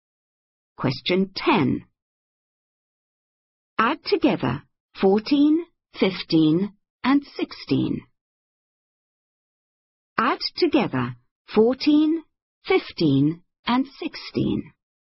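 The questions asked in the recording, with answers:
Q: Add together 14, 15, and 16.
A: 45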